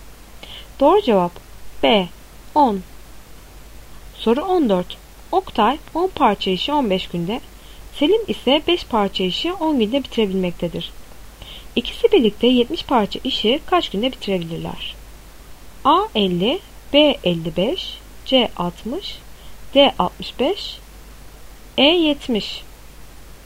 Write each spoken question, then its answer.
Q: İkisi birlikte 70 parça işi kaç günde bitirebilirler?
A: Doğru cevap C 60.